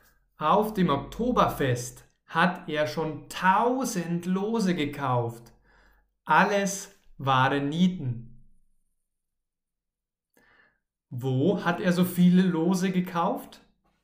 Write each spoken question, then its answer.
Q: Wo hat er so viele Lose gekauft?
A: Auf dem Oktoberfest. Er hat auf dem Oktoberfest so viele Lose gekauft.